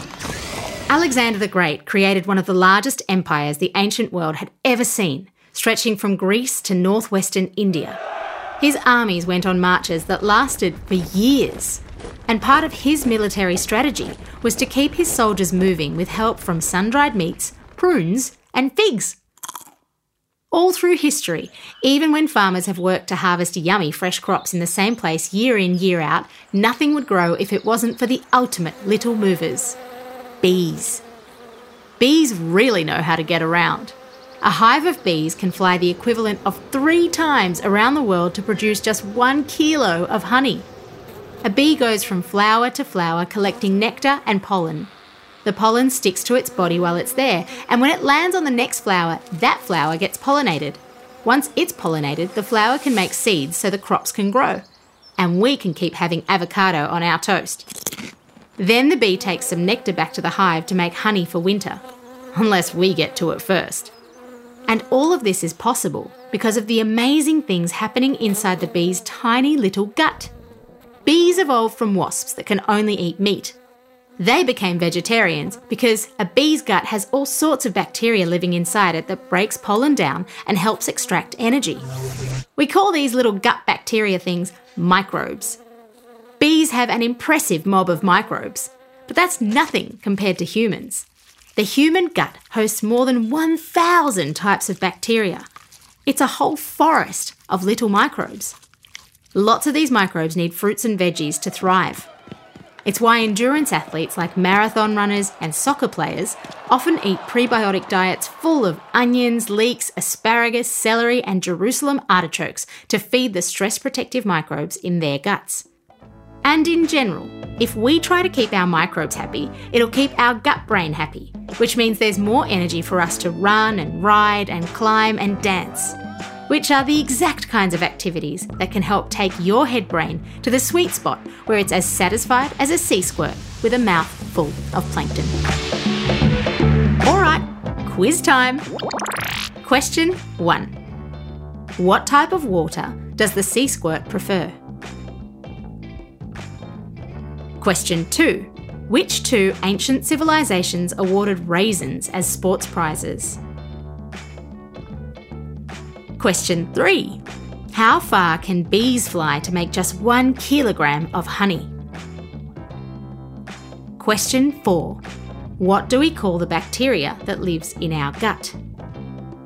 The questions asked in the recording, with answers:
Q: How far can bees fly to make just 1 kilogram of honey?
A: Three times around the world.

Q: What do we call the bacteria that lives in our gut?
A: Microbes.